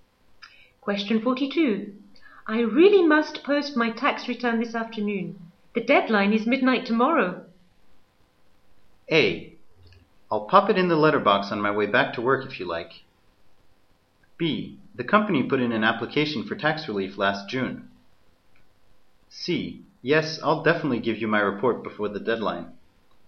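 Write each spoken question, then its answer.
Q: I really must post my tax return this afternoon.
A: A: I'll pop it in the letterbox on my way back to work if you like.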